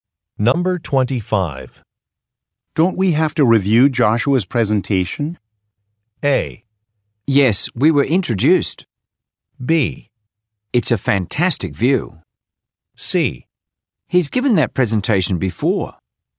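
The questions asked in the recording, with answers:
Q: Don't we have to review Joshua's presentation?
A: C: He's given that presentation before.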